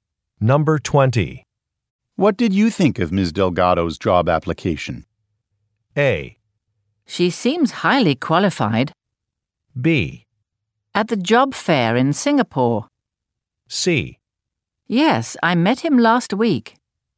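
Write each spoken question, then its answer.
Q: What did you think of Ms. Delgado's job application?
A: A: She seems highly qualified.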